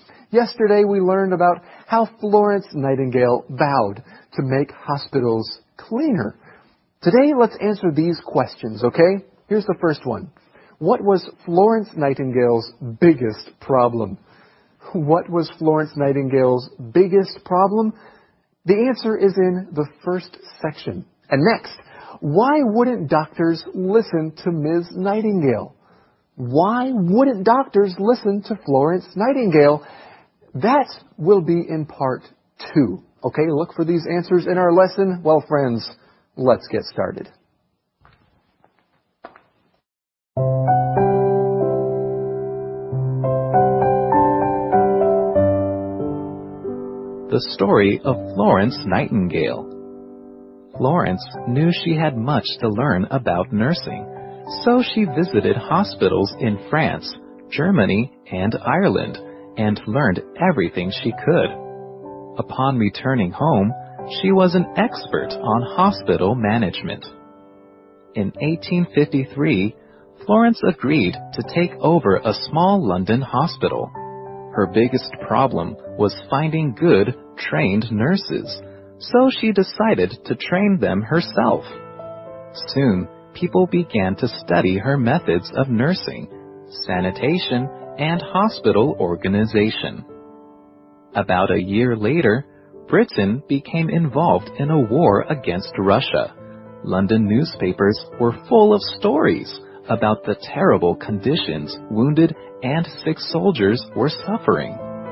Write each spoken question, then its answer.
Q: What was Florence Nightingale's biggest problem?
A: She needed to find good, trained nurses.